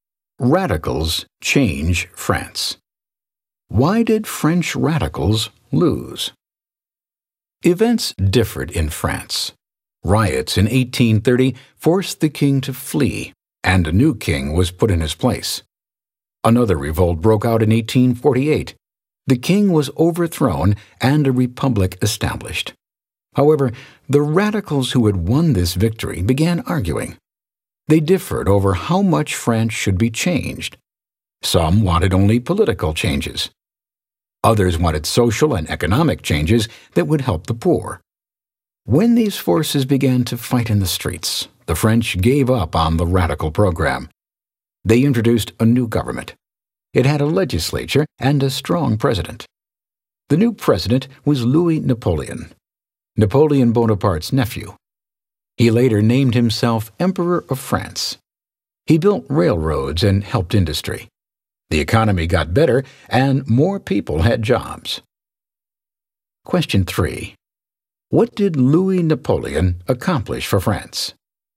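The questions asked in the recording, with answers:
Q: What did Louis Napoleon accomplish for France?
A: He built railroads and helped industry, so the economy improved and more people had jobs.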